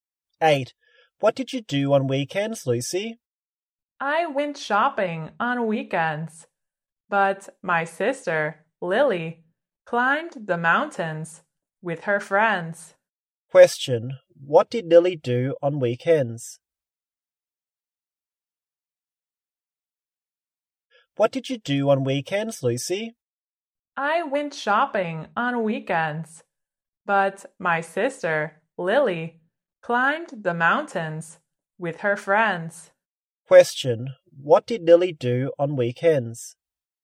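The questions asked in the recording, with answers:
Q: What did Lily do on weekends?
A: She climbed the mountains with her friends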